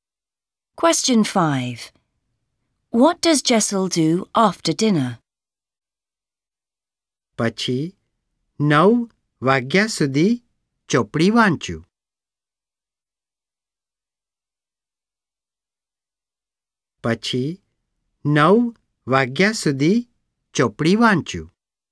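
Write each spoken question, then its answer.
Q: What does Jessel do after dinner?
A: Reads a book until 9 o'clock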